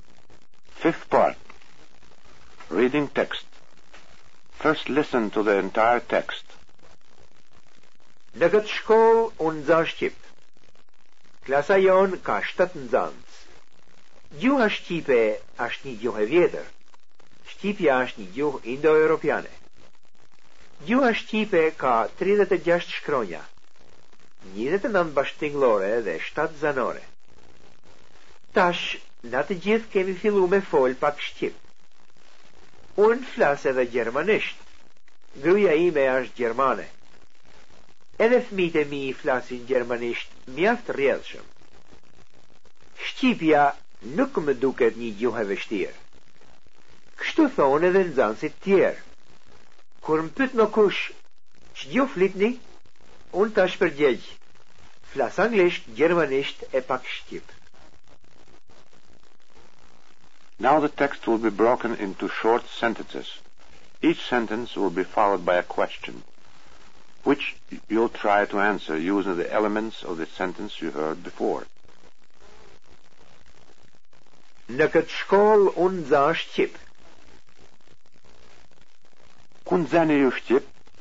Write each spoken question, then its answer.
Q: Ku nxeni ju shqip?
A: Unë nxa shqip në këtë shkollë.